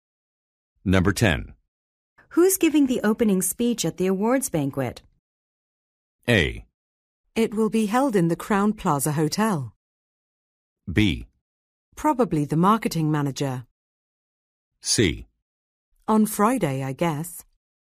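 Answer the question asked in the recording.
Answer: B: Probably the marketing manager.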